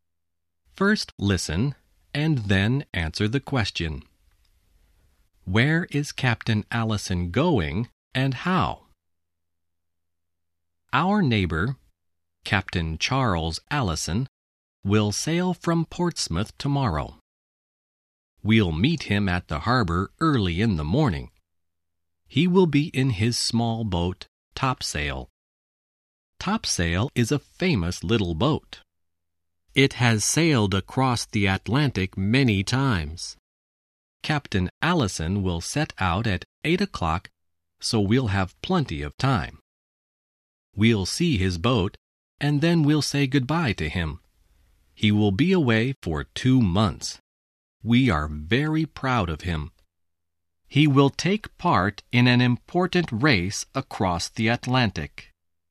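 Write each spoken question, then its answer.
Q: Where is Captain Allison going and how?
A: He is sailing across the Atlantic, in a race, in his small boat Topsail.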